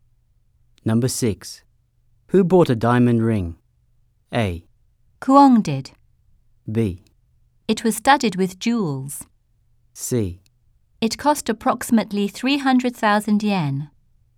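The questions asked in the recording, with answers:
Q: Who bought a diamond ring?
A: A: Kuang did.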